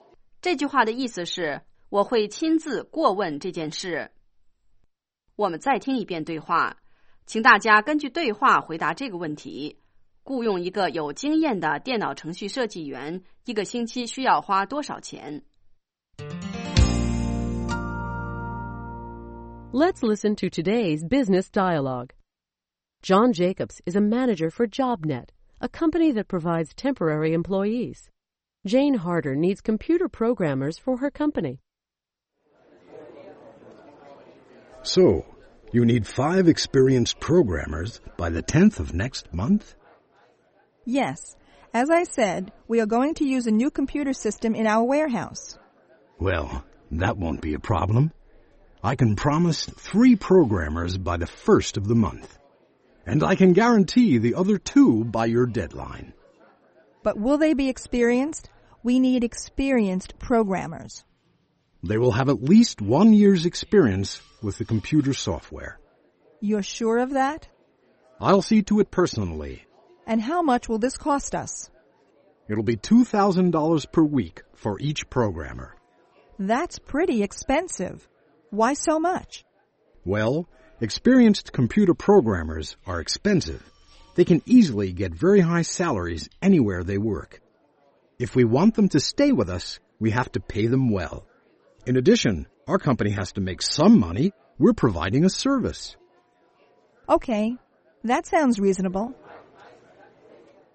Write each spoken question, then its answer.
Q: 雇用一个有经验的电脑程序设计员,一个星期需要花多少钱?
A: 2,000 per week for each programmer.